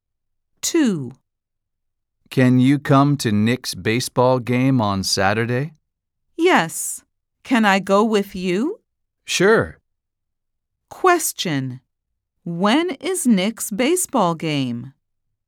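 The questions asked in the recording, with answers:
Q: When is Nick's baseball game?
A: on Saturday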